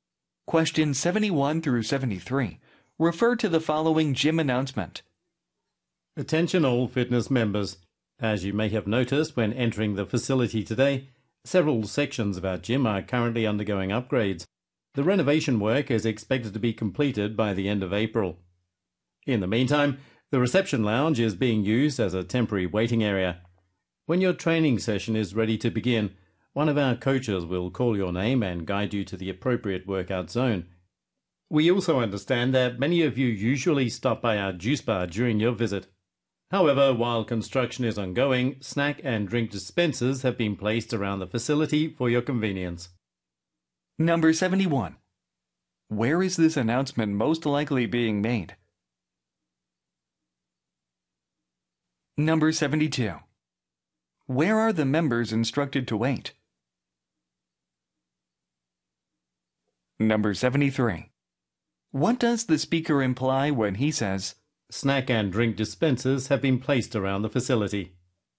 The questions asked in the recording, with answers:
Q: Where is this announcement most likely being made?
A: gym이 답이죠

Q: Where are the members instructed to wait?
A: In the reception lounge.